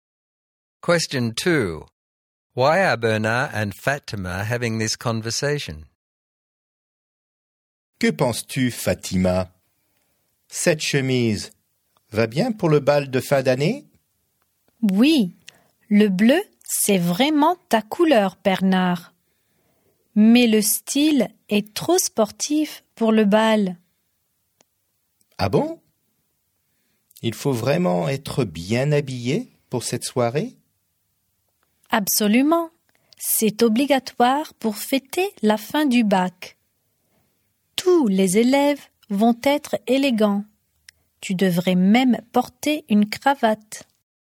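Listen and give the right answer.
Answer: To decide whether Bernard's shirt is suitable for the end-of-year ball (it is too sporty; he needs to dress formally)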